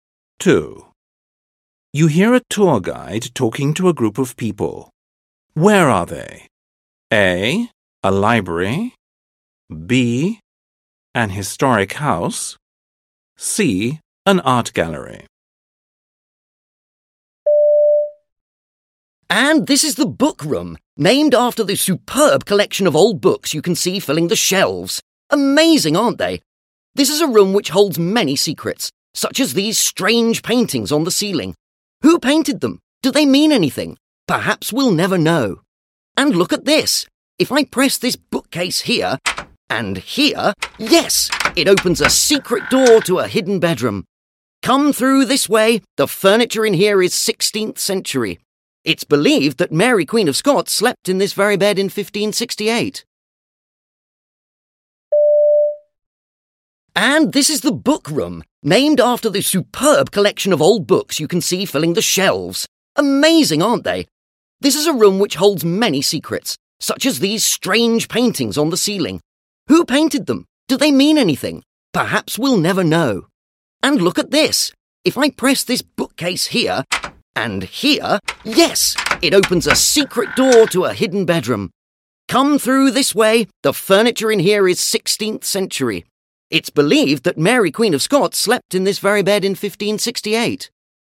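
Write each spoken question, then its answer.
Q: Where are they?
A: B: An historic house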